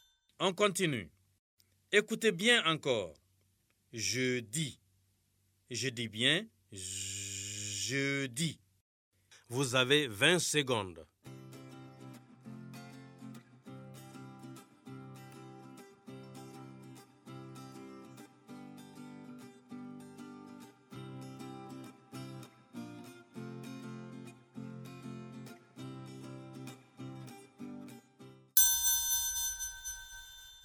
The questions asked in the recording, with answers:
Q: Jeudi. Je dis bien jeudi.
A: j'espère que vous avez écrit la lettre J sur les ardoises.